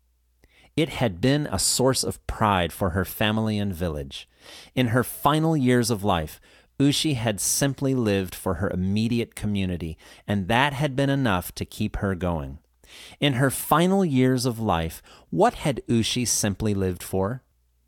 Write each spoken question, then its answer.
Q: In her final years of life, what had Ushi simply lived for?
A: She had simply lived for her immediate community.